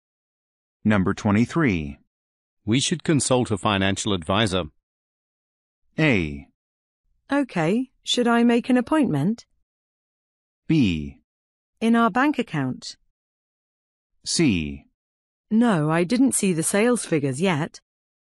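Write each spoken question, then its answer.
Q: We should consult a financial advisor.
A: A: Okay, should I make an appointment?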